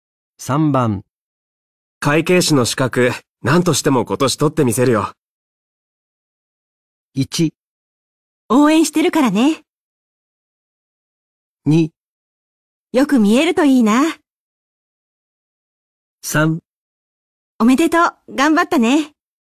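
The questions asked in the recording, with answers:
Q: 会計士の資格、何としても今年取ってみせるよ。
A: 1: 応援してるからね。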